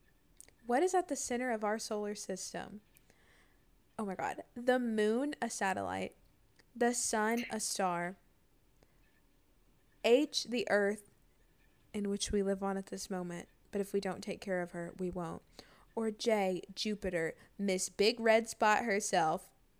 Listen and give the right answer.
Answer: Ooh, the sun. Which is G.